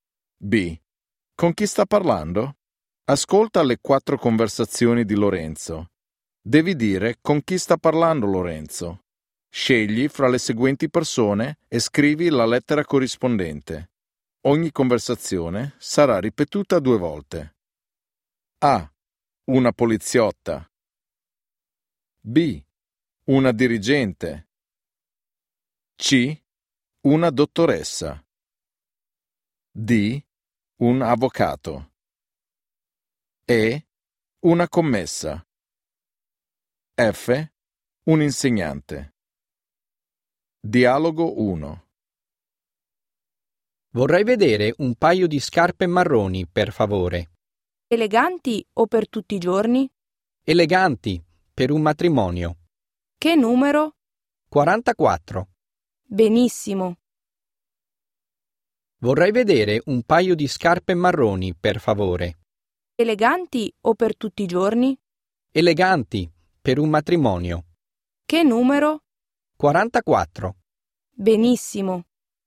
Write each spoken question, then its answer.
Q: Con chi sta parlando?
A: Dialogo 1 E